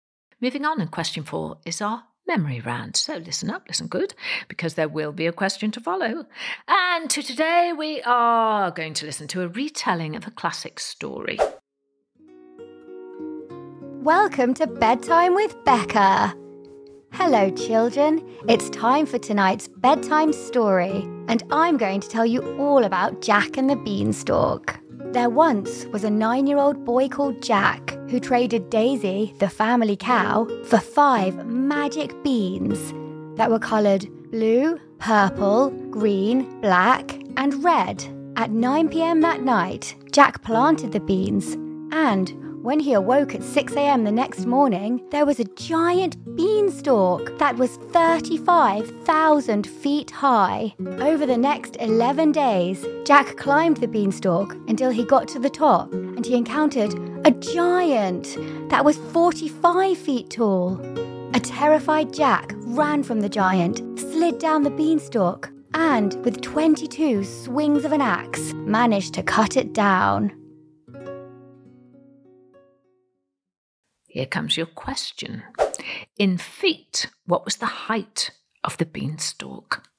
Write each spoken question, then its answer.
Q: In feet, what was the height of the beanstalk?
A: And the answer was 35,000 feet.